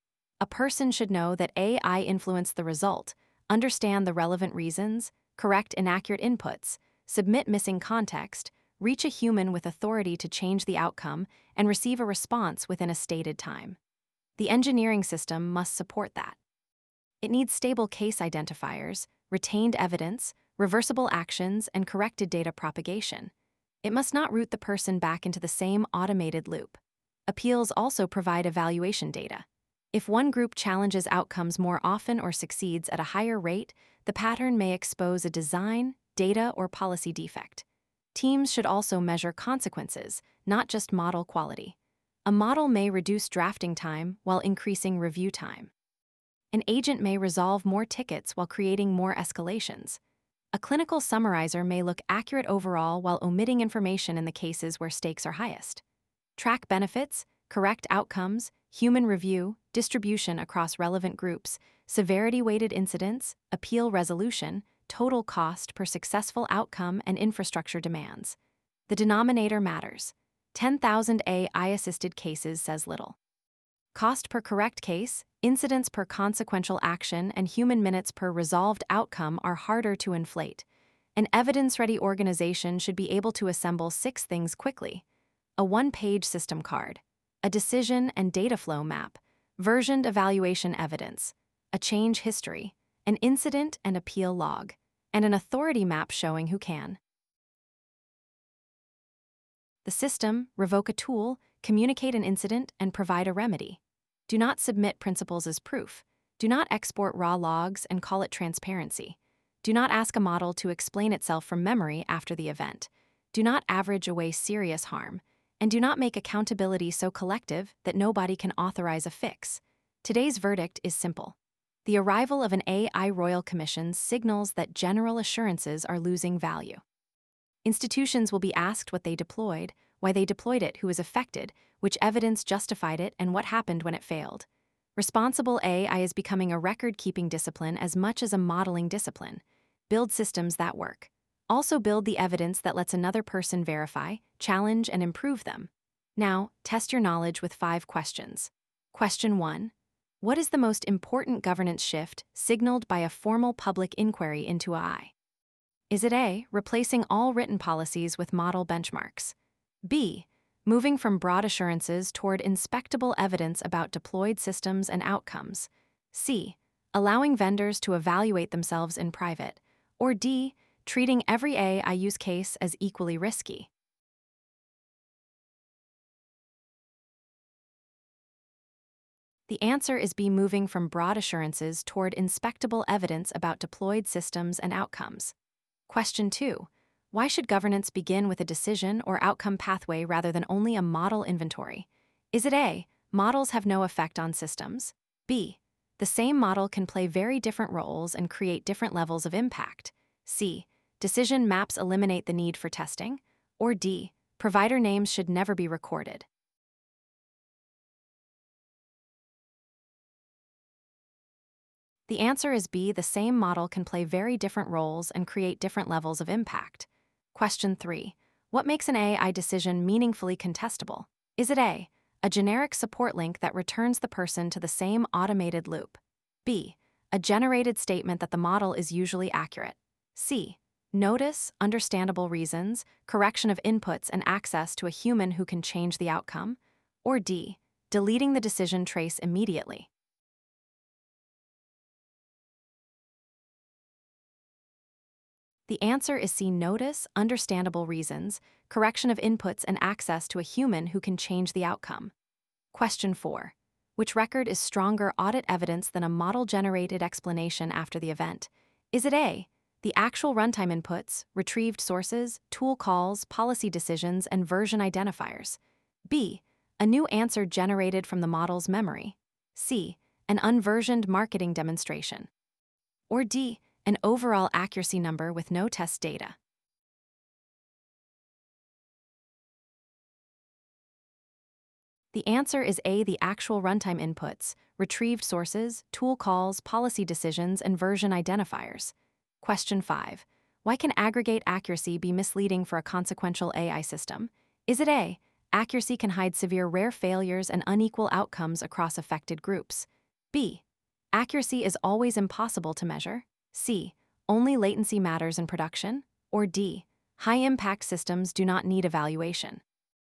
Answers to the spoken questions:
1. The answer is B, moving from broad assurances toward inspectable evidence about deployed systems and outcomes.
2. The answer is B, the same model can play very different roles and create different levels of impact.
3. The answer is see notice, understandable reasons, correction of inputs, and access to a human who can change the outcome.
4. The answer is A, the actual runtime inputs, retrieved sources, tool calls, policy decisions, and version identifiers.
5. The answer is A, accuracy can hide severe rare failures and unequal outcomes across affected groups.